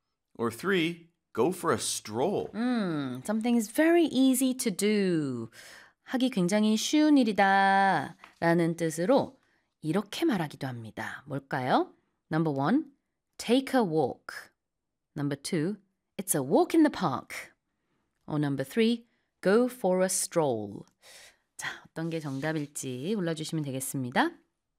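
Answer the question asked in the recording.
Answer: 2: it's a walk in the park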